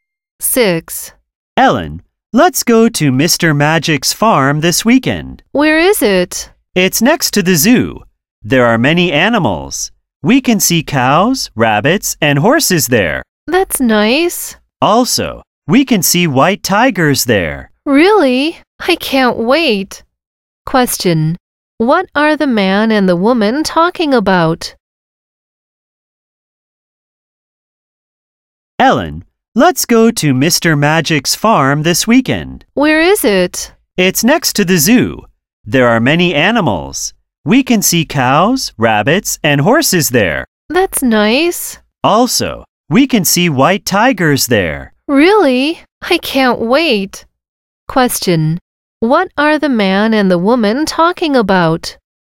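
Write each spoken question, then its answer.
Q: What are the man and the woman talking about?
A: Going to Mr. Magic's farm this weekend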